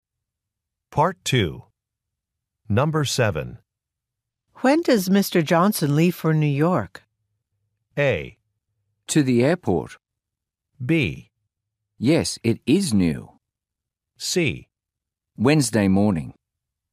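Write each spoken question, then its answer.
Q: When does Mr. Johnson leave for New York?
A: C: Wednesday morning.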